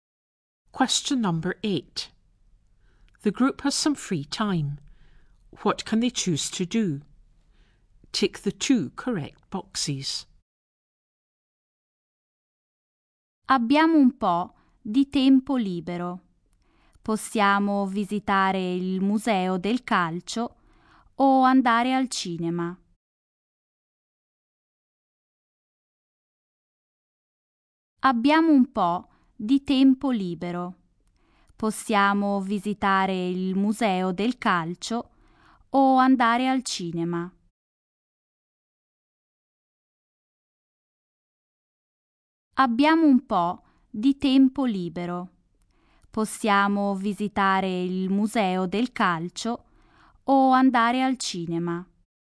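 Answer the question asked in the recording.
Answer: Visit the football museum or go to the cinema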